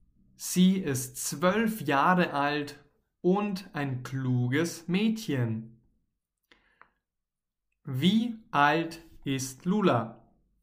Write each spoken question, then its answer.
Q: Wie alt ist Lula?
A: zwölf Jahre alt. Lula ist zwölf Jahre alt.